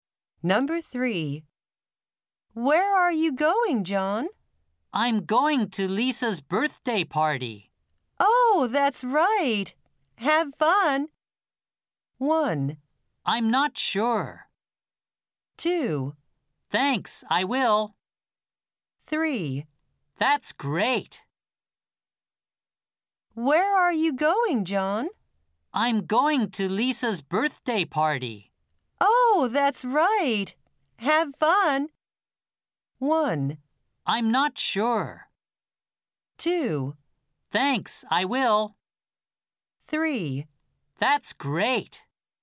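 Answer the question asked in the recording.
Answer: 2: Thanks, I will.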